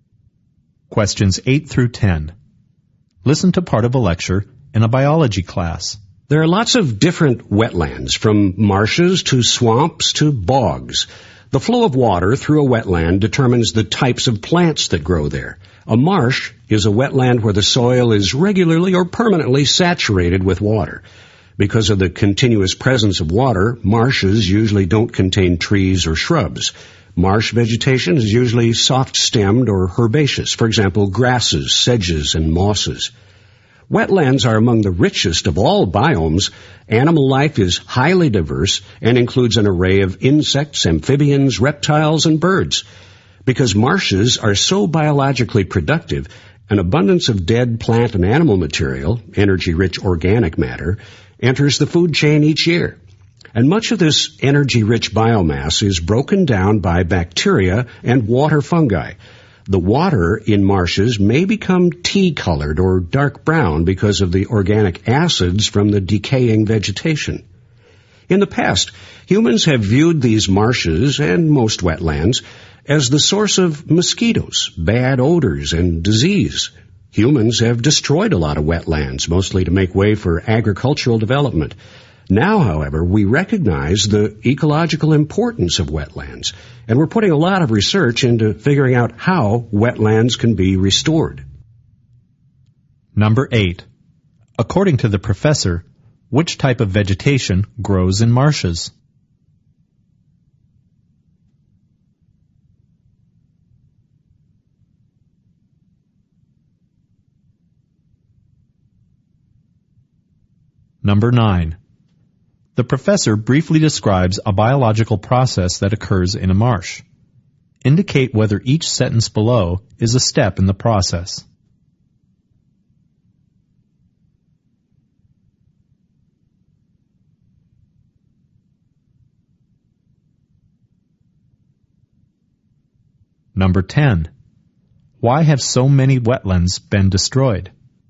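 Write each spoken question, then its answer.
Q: According to the professor, which type of vegetation grows in marshes?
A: Soft-stemmed (herbaceous) plants such as grasses, sedges and mosses

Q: Why have so many wetlands been destroyed?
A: To make way for agricultural development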